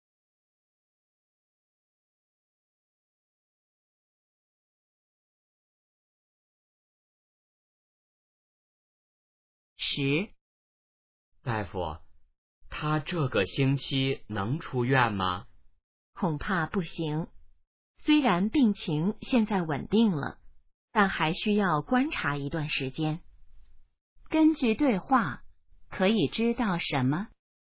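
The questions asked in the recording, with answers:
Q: 根据对话,可以知道什么?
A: 病人这个星期还不能出院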